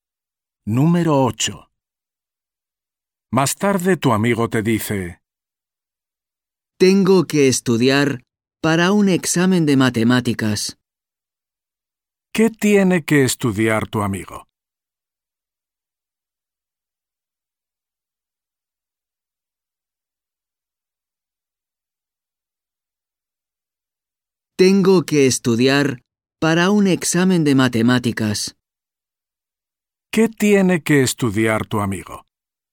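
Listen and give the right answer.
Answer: matemáticas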